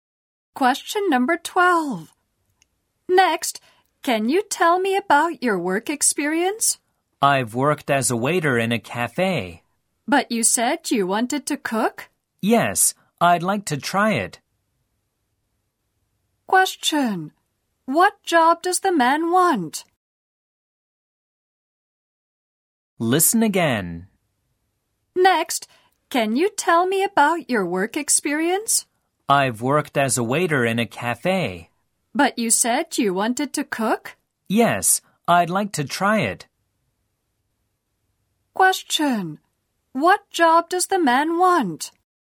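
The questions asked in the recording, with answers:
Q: What job does the man want?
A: Cook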